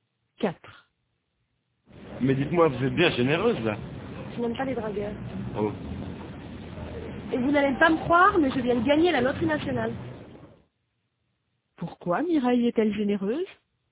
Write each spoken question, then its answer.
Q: Pourquoi Mireille est-elle généreuse?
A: Parce qu'elle vient de gagner à la loterie nationale.